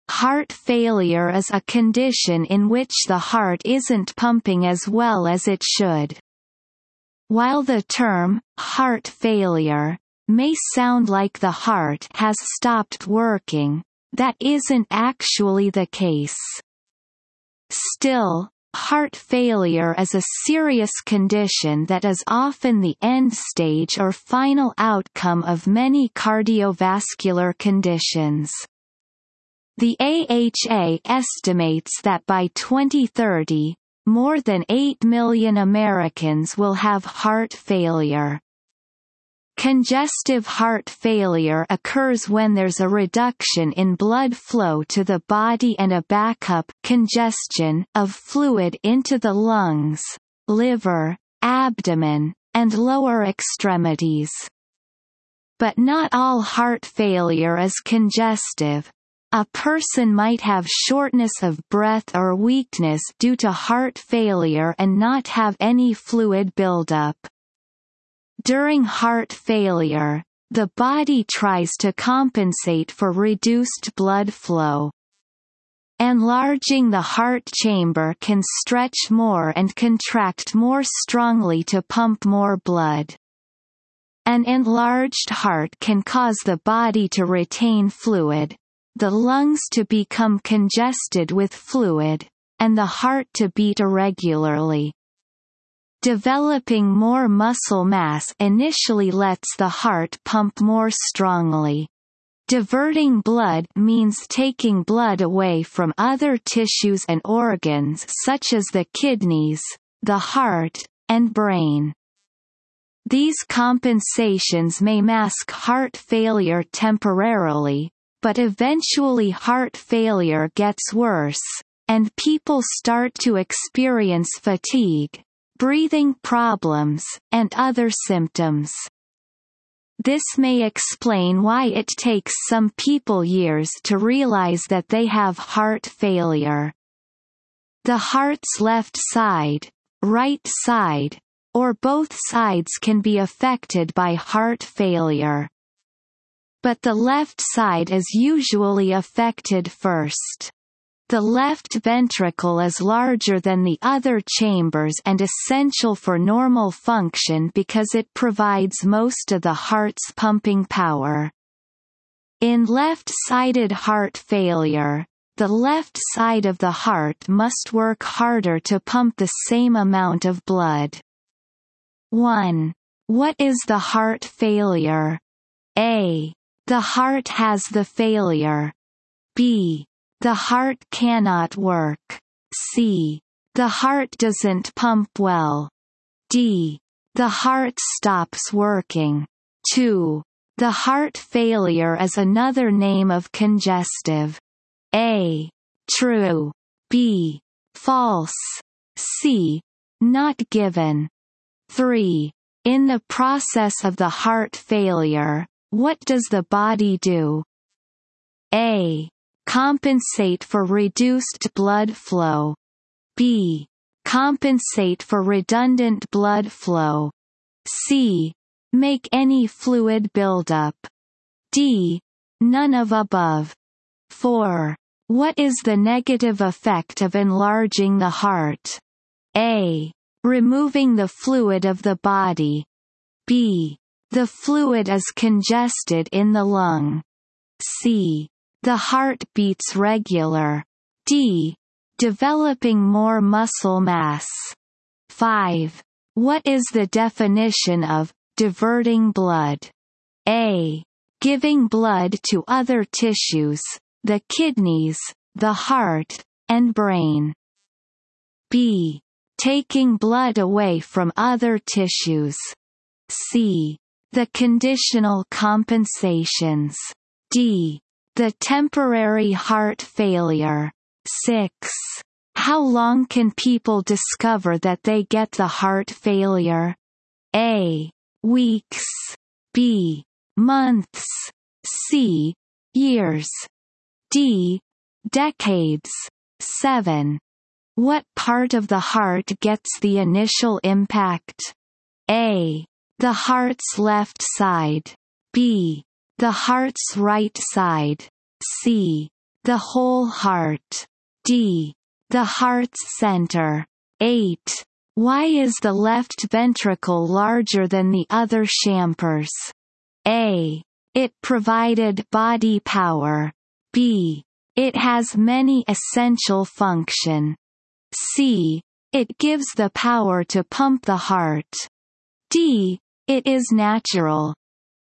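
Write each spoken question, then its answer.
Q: What is the heart failure?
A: C: The heart doesn't pump well.

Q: The heart failure is another name of congestive.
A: B: False.

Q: In the process of the heart failure, what does the body do?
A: A: Compensate for reduced blood flow.

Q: What is the negative effect of enlarging the heart?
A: B: The fluid is congested in the lung.

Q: What is the definition of diverting blood?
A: B: Taking blood away from other tissues.

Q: How long can people discover that they get the heart failure?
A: C: Years.

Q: What part of the heart gets the initial impact?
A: A: The heart's left side.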